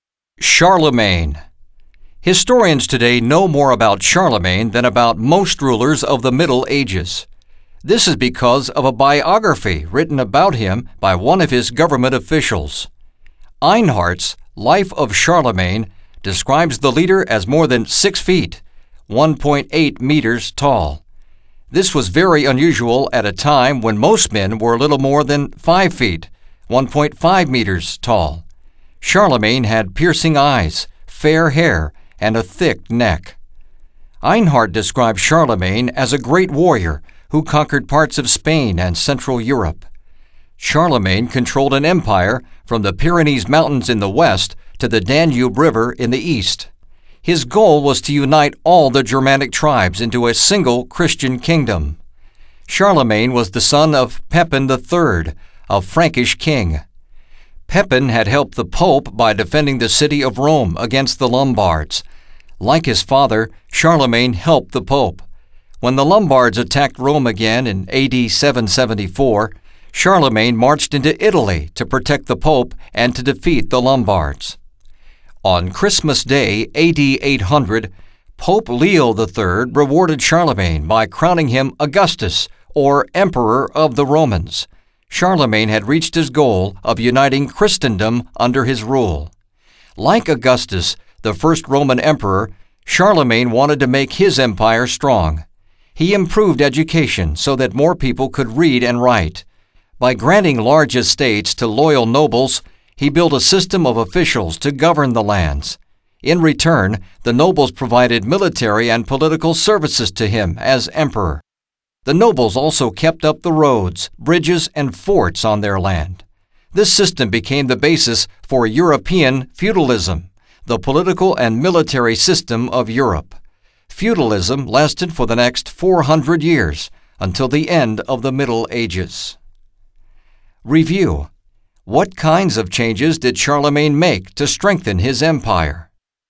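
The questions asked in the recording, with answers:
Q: What kinds of changes did Charlemagne make to strengthen his empire?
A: He improved education and gave estates to loyal nobles who governed and served him, the basis of feudalism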